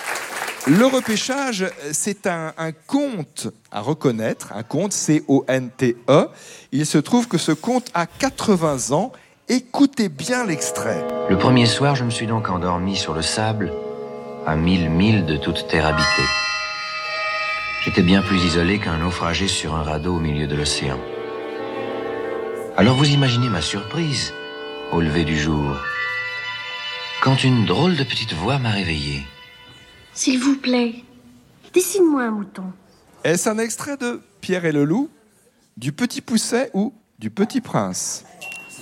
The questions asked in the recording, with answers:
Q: Est-ce un extrait de Pierre et le Loup, du Petit Poucet ou du Petit Prince ?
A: Oui, c'est un extrait du Petit Prince de Saint-Exupéry, avec la voix de Gérard Philippe.